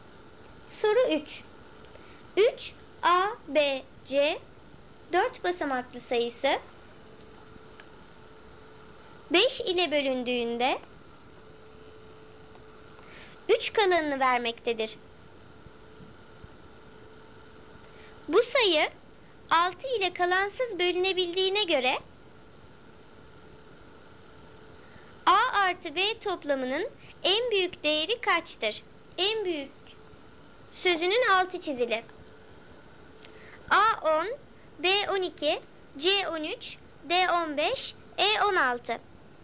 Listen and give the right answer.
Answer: Doğru cevap E16.